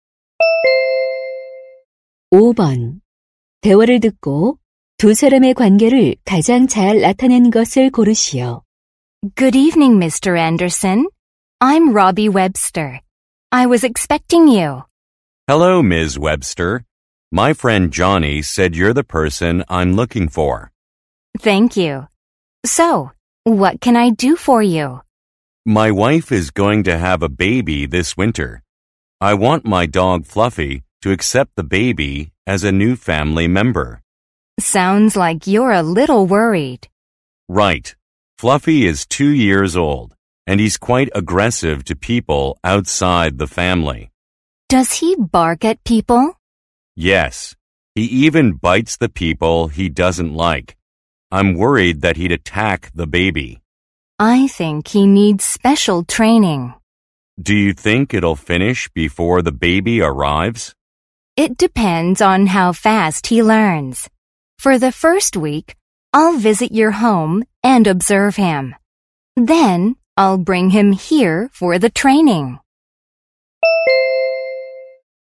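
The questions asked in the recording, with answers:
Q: 대화를 듣고 두 사람의 관계를 가장 잘 나타낸 것을 고르시오.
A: 반려견 훈련사 - 개 주인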